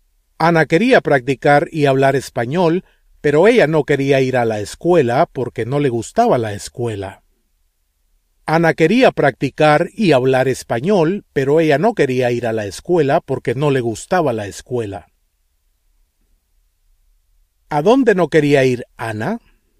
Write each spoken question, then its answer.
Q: ¿A dónde no quería ir Ana?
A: A la escuela.